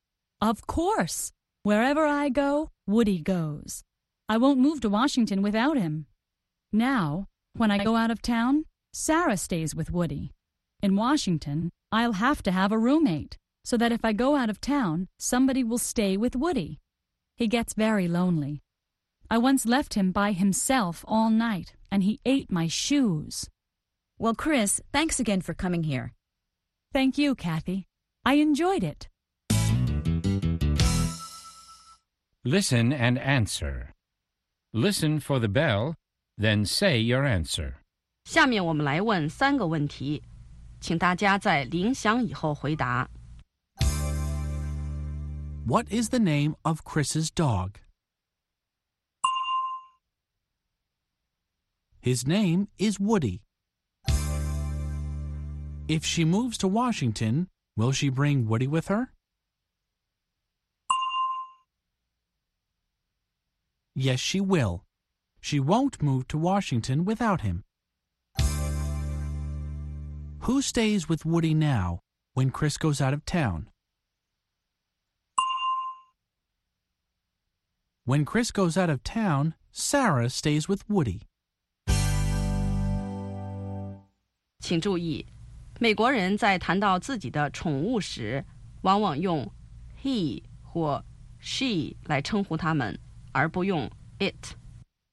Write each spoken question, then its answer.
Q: What is the name of Chris's dog?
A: His name is Woody.

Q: Who stays with Woody now when Chris goes out of town?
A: When Chris goes out of town, Sarah stays with Woody.